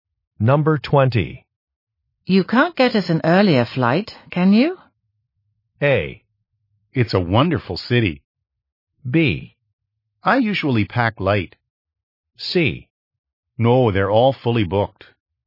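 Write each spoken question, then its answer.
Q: You can't get us an earlier flight, can you?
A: C: No, they're all fully booked.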